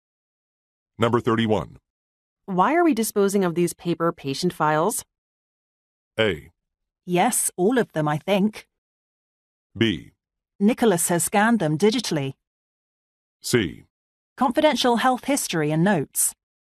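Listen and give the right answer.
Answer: B: Nicholas has scanned them digitally.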